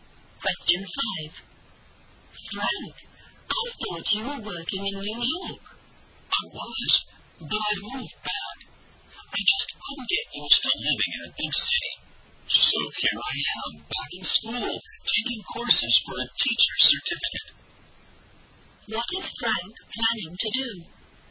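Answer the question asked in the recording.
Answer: Become a teacher (he is taking courses for a teacher certificate)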